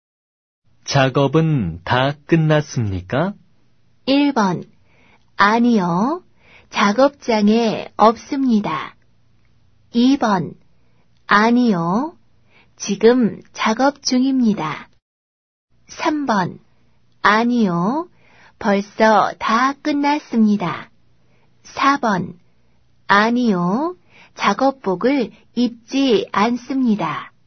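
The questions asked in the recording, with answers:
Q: 작업은 다 끝났습니까?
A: 2: 아니요. 지금 작업 중입니다.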